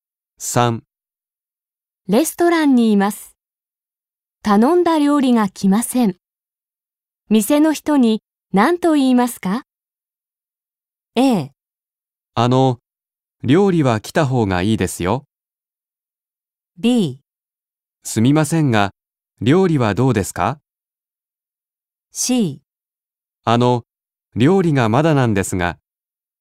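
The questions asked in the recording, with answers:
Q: 店の人に何と言いますか?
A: C: 料理がまだなんですが。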